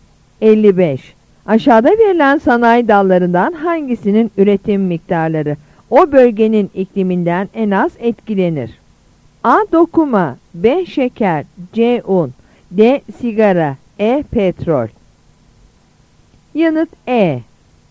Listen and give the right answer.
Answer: Yanıt E.